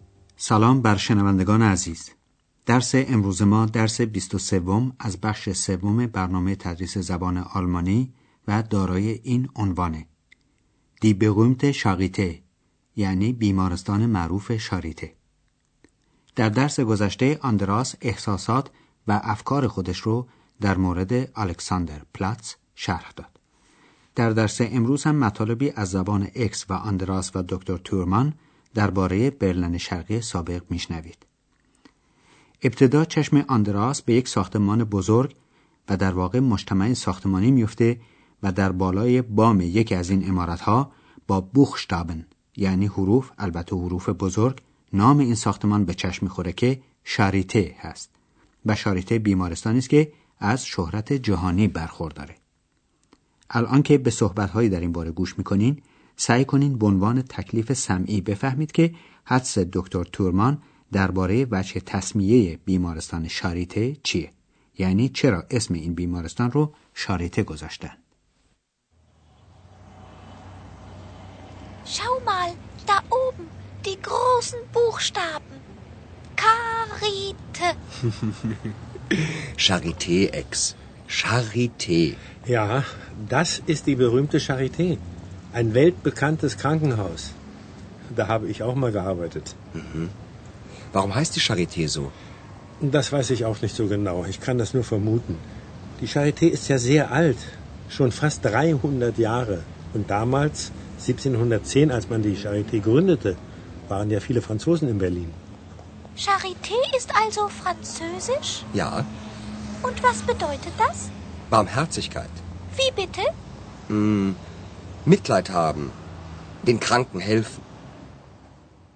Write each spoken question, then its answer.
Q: سعی کنین به عنوان تکلیف سمعی بفهمید که حدس دکتر تورمان درباره وجه تصمیه بیمارستان شاریته چیه یعنی چرا اسم این بیمارستان رو شاریته گذاشتن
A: پس فهمیدیم که شاریته یک کلمه فرانسوی است.